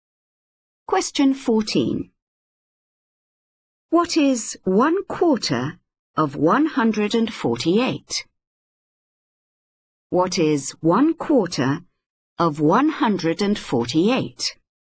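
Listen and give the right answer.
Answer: 37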